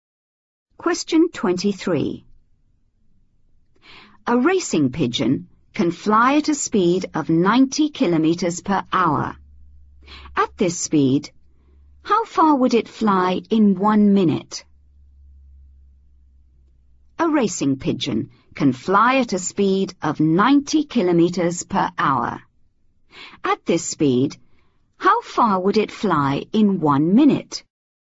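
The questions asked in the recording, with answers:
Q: At this speed, how far would it fly in 1 minute?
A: 1.5 km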